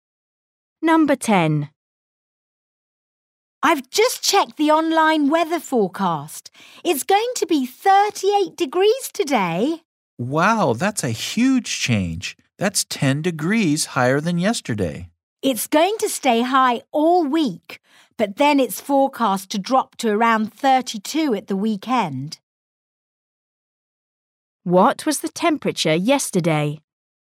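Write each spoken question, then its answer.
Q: What was the temperature yesterday?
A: 28 degrees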